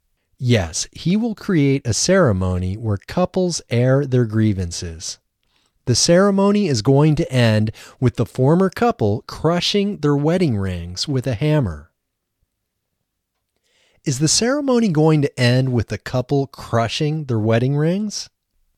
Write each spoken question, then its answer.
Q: Is the ceremony going to end with the couple crushing their wedding rings?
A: Yes, the ceremony is going to end with the couple crushing their wedding rings.